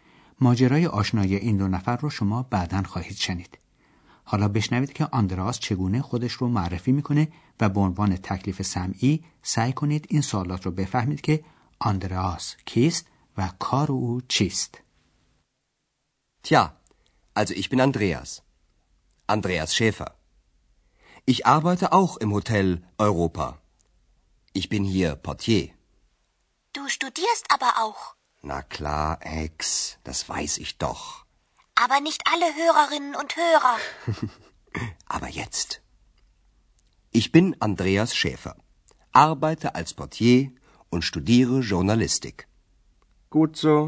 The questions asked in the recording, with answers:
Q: آندراس کیست و کار او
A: به طوری که شنیدید آندراس در هتل اروپا هم کار میکنه